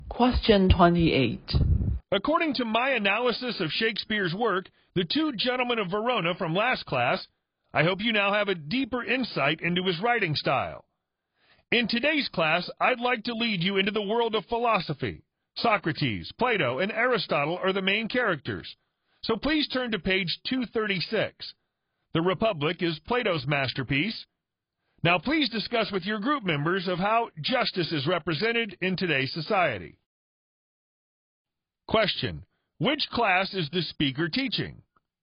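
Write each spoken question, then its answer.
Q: which class is the speaker teaching?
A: A philosophy class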